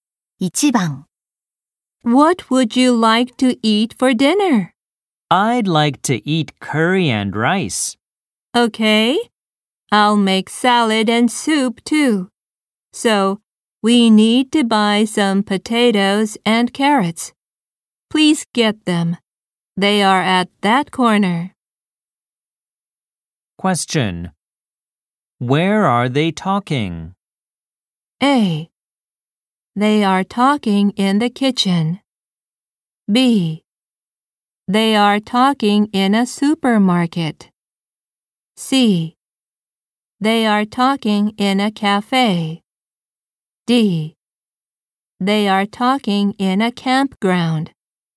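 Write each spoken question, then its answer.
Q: Where are they talking?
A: B: They are talking in a supermarket.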